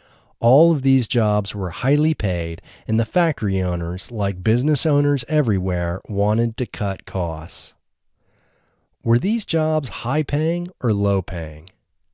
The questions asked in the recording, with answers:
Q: Were these jobs high-paying or low-paying?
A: These jobs were high-paying.